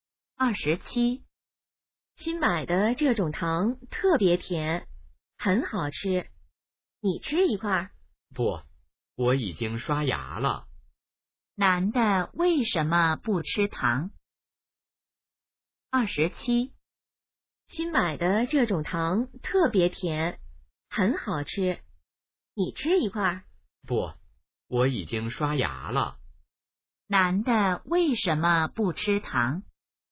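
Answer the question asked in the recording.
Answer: 已经刷牙了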